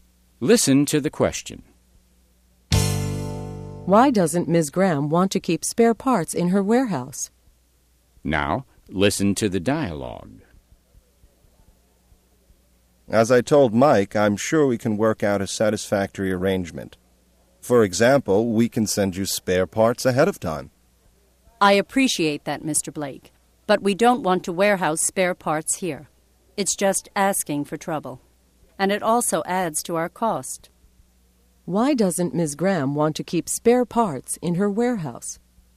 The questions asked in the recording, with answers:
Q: Why doesn't Ms. Graham want to keep spare parts in her warehouse?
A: She thinks it would cause trouble and add to her costs.